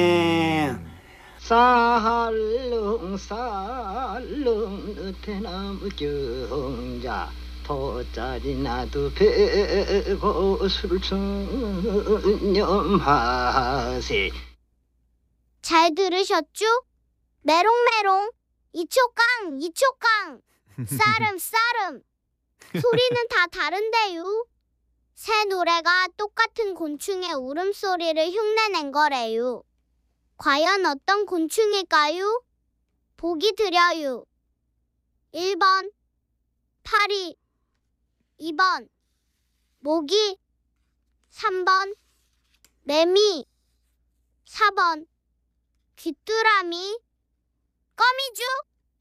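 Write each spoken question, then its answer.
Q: 과연 어떤 곤충일까요? 보기 드려요. 1번 파리, 2번 모기, 3번 매미, 4번 귀뚜라미.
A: 3: 매미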